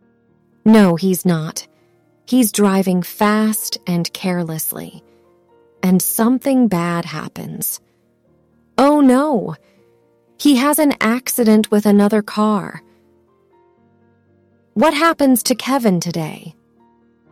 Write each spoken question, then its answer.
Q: What happens to Kevin today?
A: An accident.